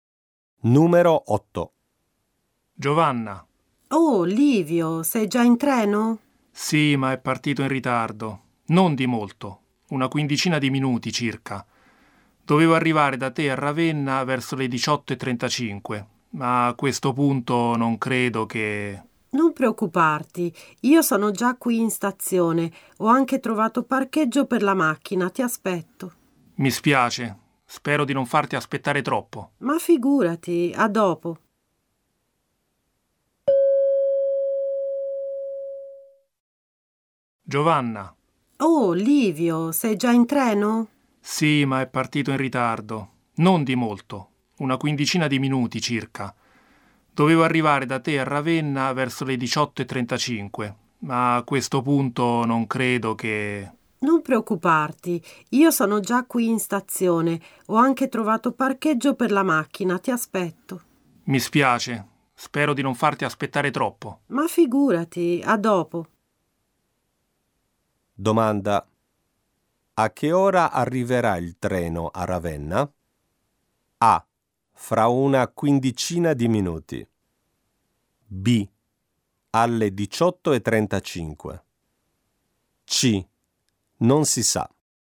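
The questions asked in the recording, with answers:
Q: A che ora arriverà il treno a Ravenna?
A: C: Non si sa.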